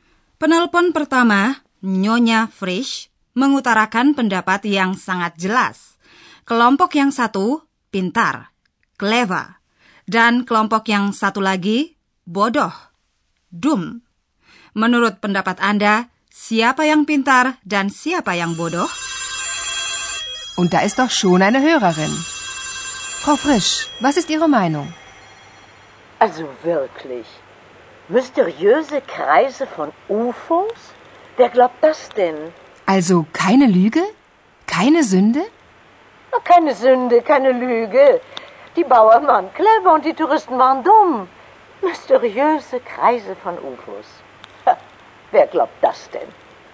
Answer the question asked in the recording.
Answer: Menurut pendapat Nyonya Frisch, orang petani, Bauern, telah bertindak pintar dan para turis itu Bodoh.